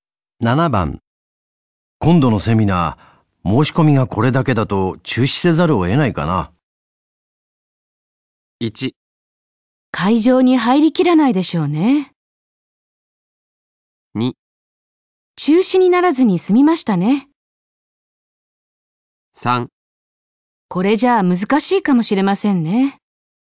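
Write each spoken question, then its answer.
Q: 今度のセミナー、申し込みがこれだけだと中止せざるを得ないかな。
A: 3: これじゃあ難しいかもしれませんね。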